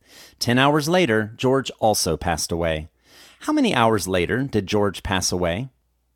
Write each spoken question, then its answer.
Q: How many hours later did George pass away?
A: George passed away 10 hours later.